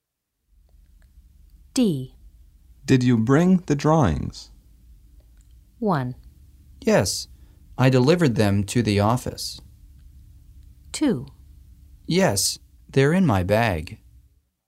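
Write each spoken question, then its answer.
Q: Did you bring the drawings?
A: 2: Yes, they're in my bag.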